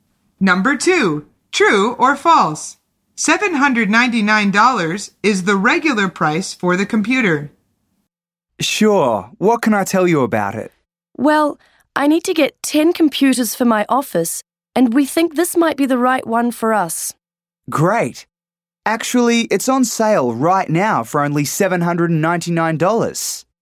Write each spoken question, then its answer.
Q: $799 is the regular price for the computer.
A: The answer is false.